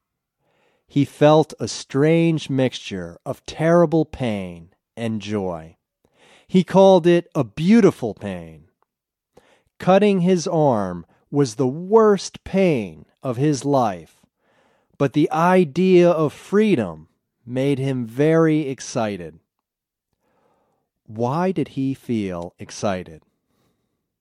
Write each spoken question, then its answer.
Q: Why did he feel excited?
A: He felt excited because he was almost free.